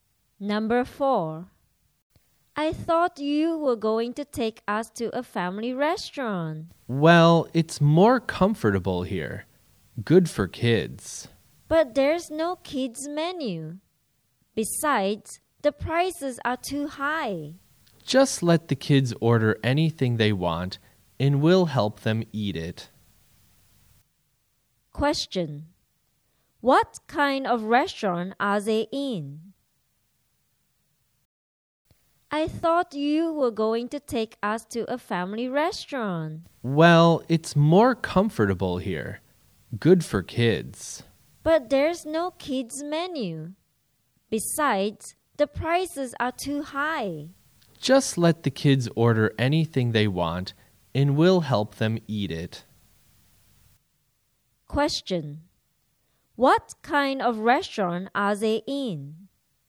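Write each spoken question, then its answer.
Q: What kind of restaurant are they in?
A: An expensive restaurant with no kids menu (not a family restaurant)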